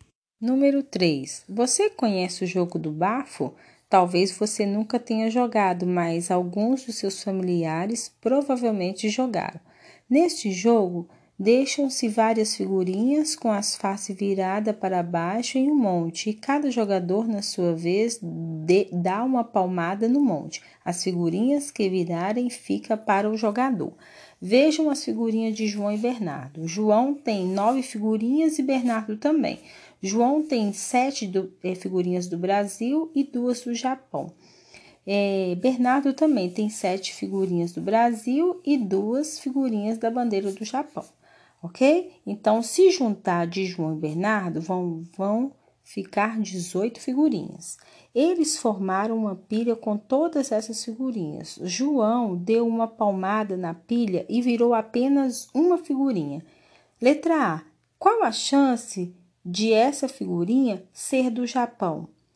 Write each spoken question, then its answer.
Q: Qual a chance de essa figurinha ser do Japão?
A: Será de 4 em 18.